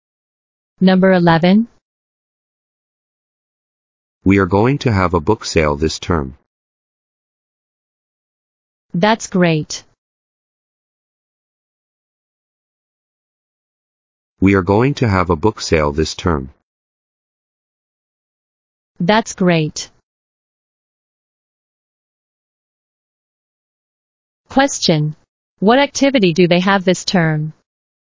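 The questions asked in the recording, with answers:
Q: What activity do they have this term?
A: A book sale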